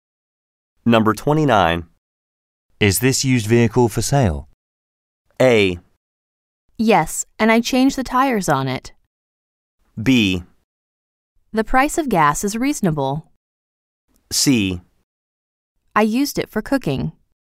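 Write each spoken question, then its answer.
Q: Is this used vehicle for sale?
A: A: Yes, and I changed the tires on it.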